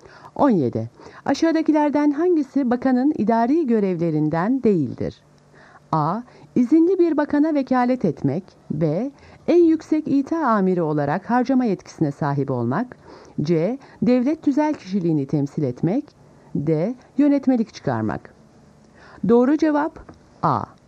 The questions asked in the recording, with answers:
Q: Aşağıdakilerden hangisi bakanın idari görevlerinden değildir?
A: Doğru cevap A. İzinli bir bakana vekalet etmek.